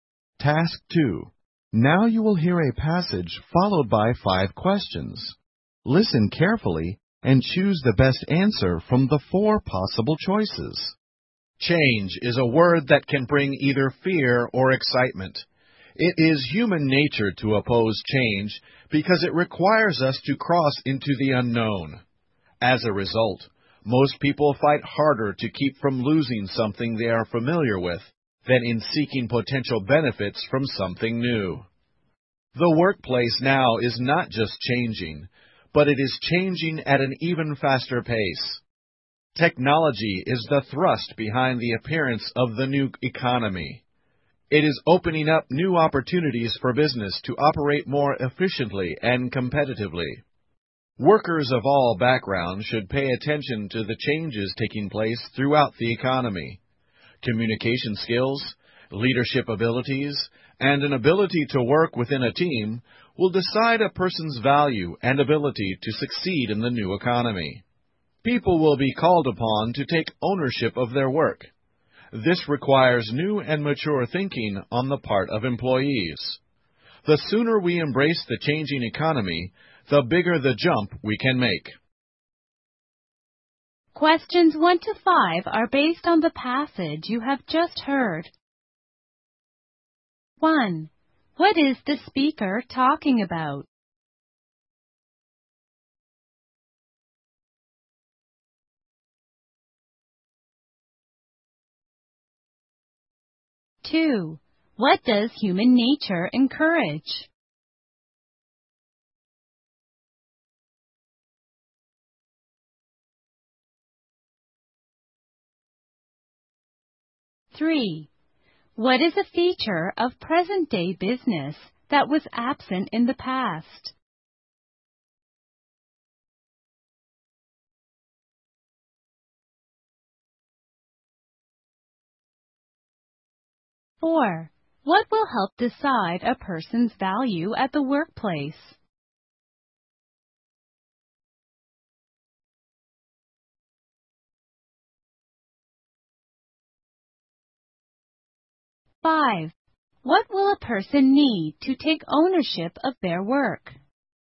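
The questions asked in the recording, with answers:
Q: What is the speaker talking about?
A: Change in the workplace and economy

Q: What does human nature encourage?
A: Opposing change

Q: What will help decide a person's value at the workplace?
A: Communication skills, leadership abilities and teamwork

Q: What will a person need to take ownership of their work?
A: New and mature thinking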